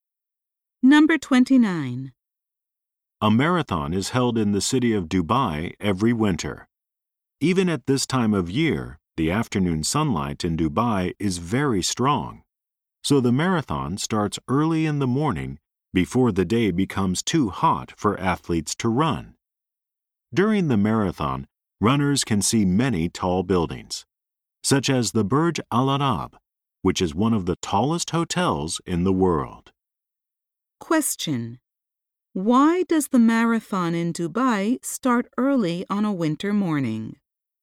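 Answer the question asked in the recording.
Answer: The afternoon sun is too strong/hot for runners.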